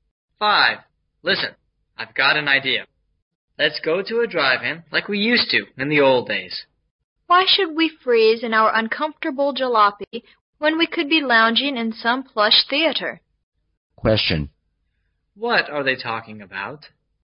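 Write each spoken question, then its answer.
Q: What are they talking about?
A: Where to go to see a movie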